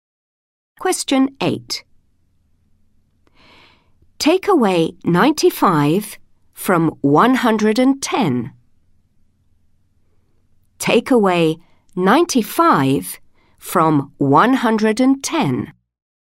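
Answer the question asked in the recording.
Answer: 15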